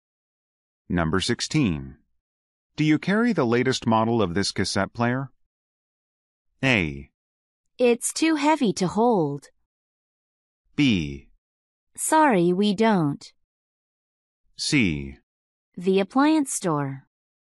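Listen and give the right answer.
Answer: B: Sorry, we don't.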